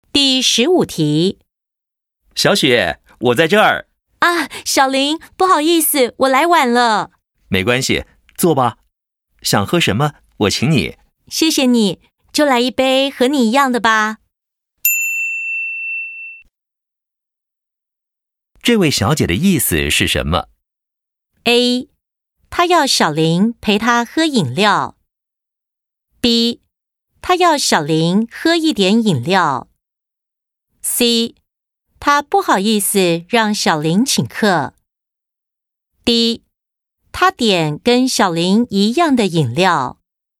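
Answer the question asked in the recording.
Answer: D: 她点跟小林一样的饮料。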